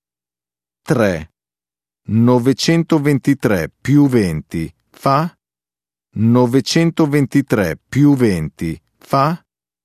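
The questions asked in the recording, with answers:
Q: 923 più 20 fa?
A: 943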